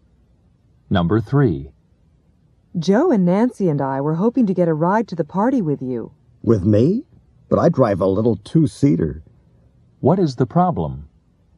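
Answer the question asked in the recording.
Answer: The car only has two seats, so there is no room for everyone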